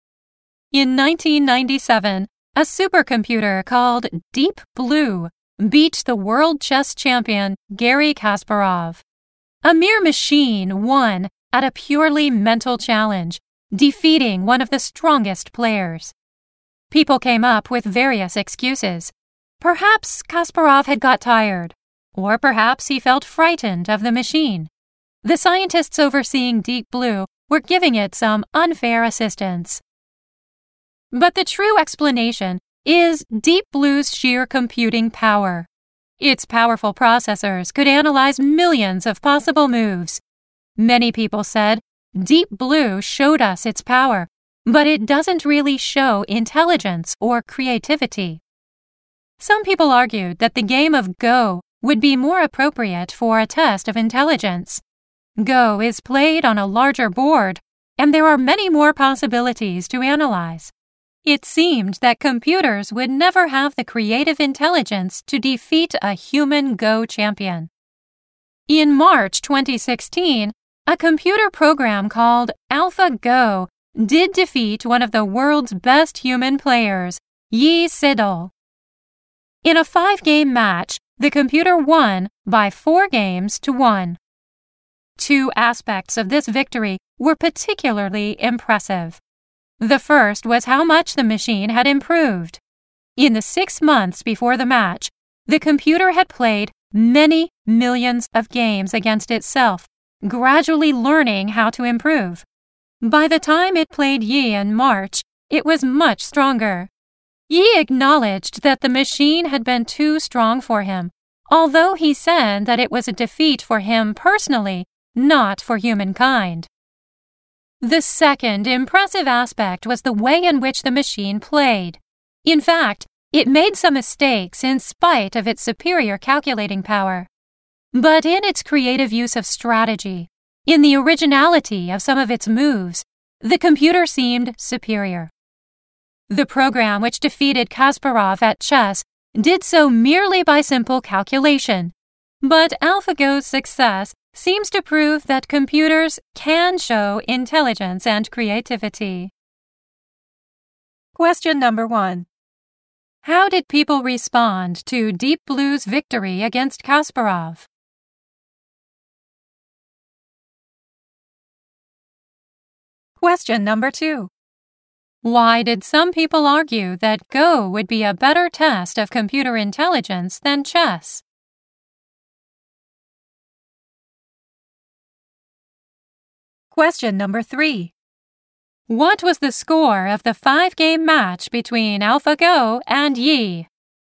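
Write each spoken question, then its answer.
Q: How did people respond to Deep Blue's victory against Kasparov?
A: They came up with various excuses.

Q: Why did some people argue that Go would be a better test of computer intelligence than chess?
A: Go is played on a larger board with many more possibilities to analyze.

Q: What was the score of the 5-game match between AlphaGo and Yi?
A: 4-1 to the computer.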